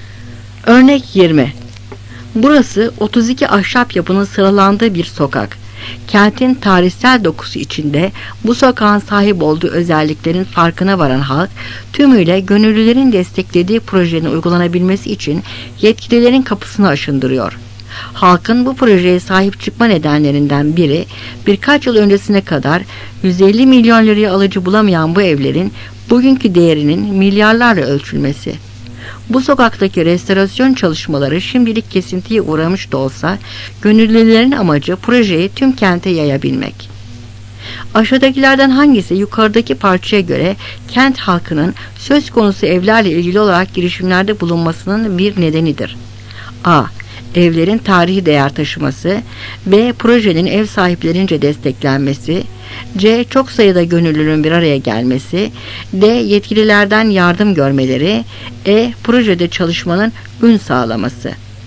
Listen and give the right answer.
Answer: Cevap A.